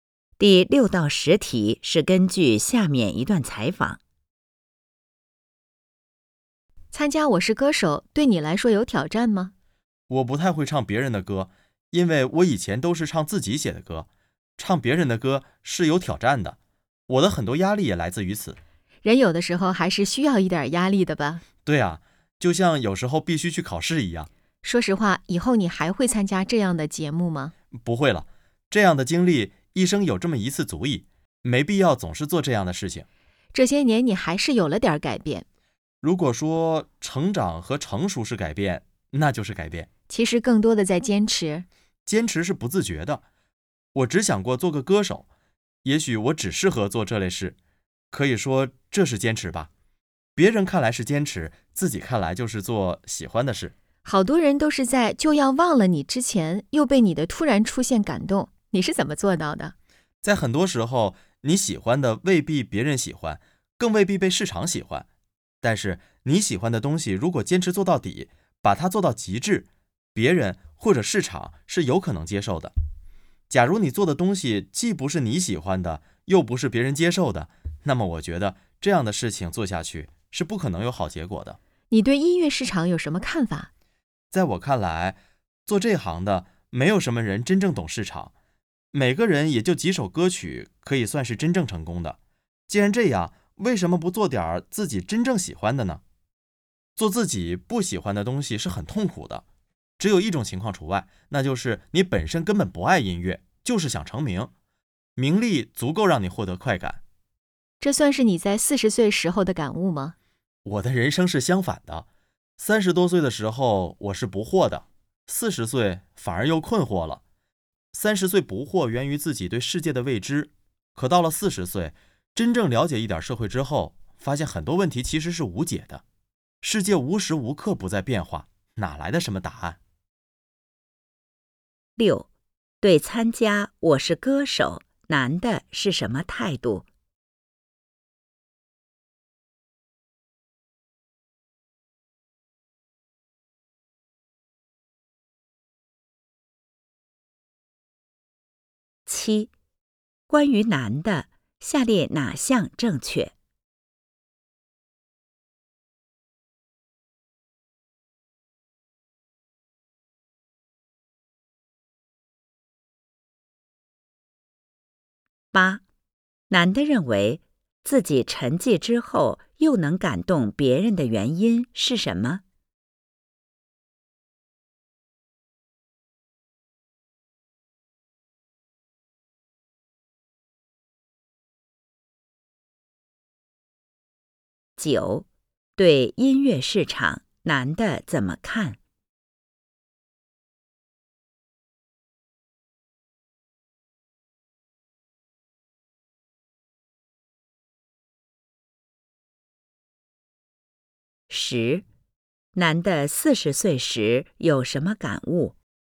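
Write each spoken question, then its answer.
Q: 难的认为自己沉寂之后又能感动别人的原因是什么?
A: 坚持做自己喜欢的东西,并把它做到极致

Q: 对音乐市场难的怎么看?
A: 没有什么人真正懂市场

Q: 难的四十岁时有什么感悟?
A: 反而又困惑了,发现很多问题其实是无解的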